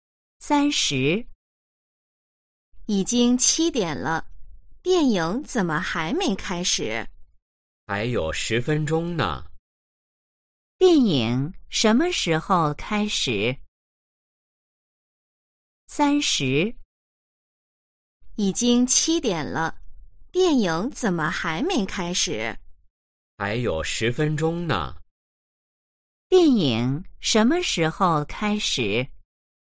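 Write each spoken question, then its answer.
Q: 电影什么时候开始?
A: 7点10分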